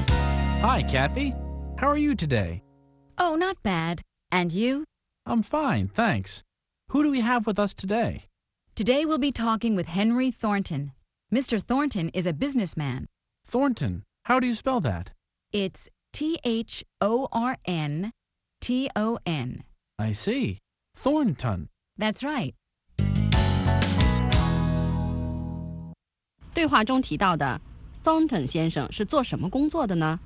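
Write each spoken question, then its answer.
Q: 对话中提到的 Thornton 先生是做什么工作的呢?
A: 商人(businessman)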